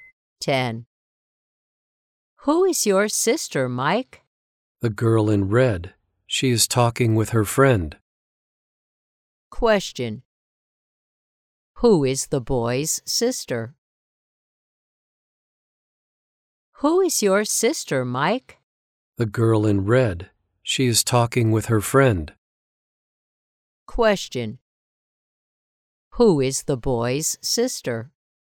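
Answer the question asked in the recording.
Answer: The girl in red.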